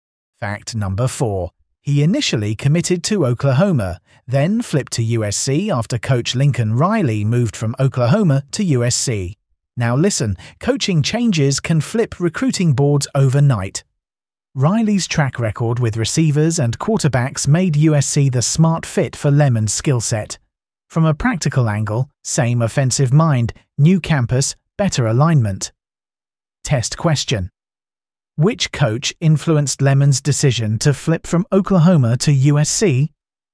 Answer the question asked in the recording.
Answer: Correct answer, Lincoln Riley.